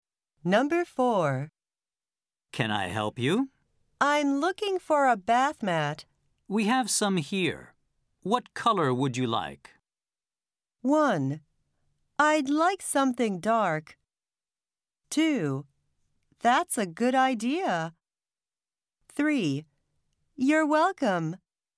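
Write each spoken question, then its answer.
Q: We have some here. What color would you like?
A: 1: I'd like something dark.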